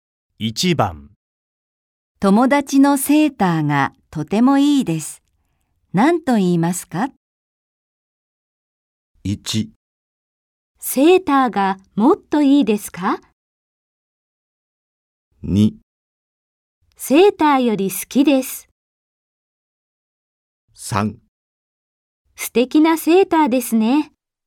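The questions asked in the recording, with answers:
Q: 友達のセーターがとてもいいです。何と言いますか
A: 3: 素敵なセーターですね。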